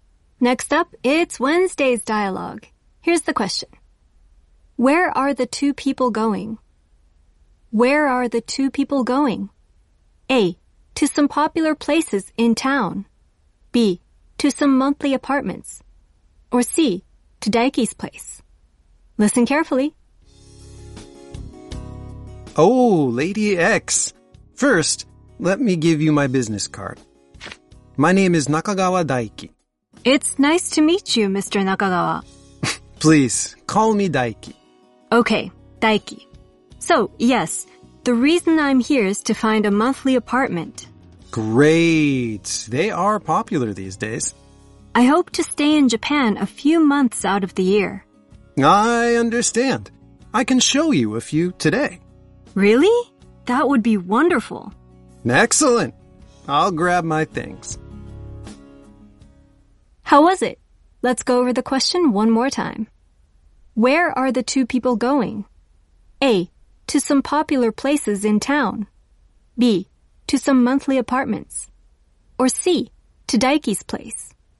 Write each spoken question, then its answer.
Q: Where are the two people going?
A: B. To some monthly apartments.